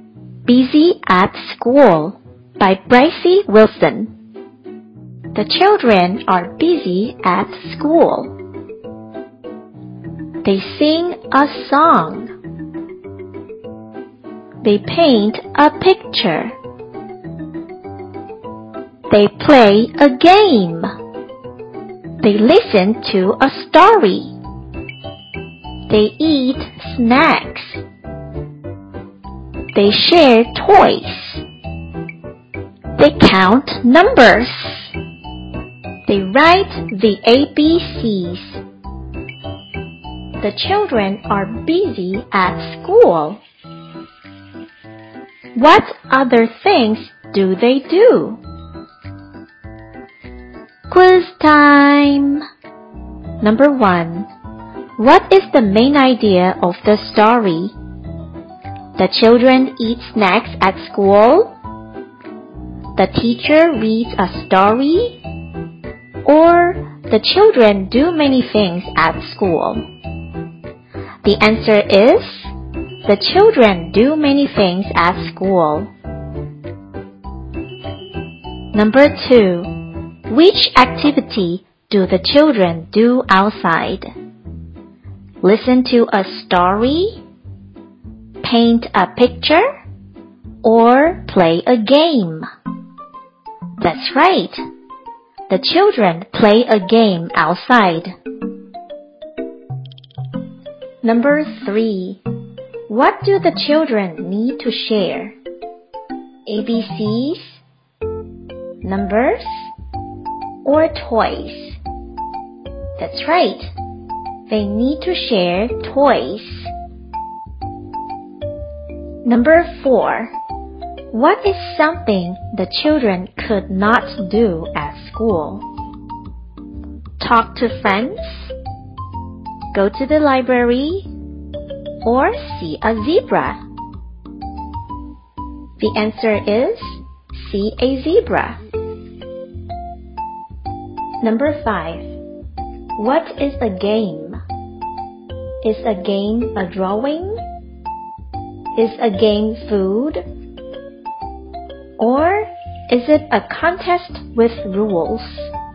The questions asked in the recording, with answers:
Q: What is the main idea of the story?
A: The answer is the children do many things at school.

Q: which activity do the children do outside?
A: That's right. The children play a game outside.

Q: What do the children need to share?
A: They need to share toys.

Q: What is something the children could not do at school?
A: The answer is see a zebra.